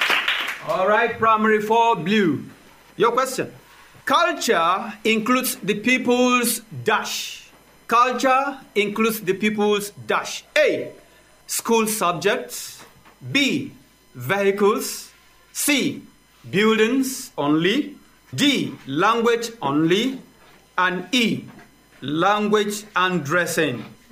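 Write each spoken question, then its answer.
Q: Culture includes the people's dash.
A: E: language and dressing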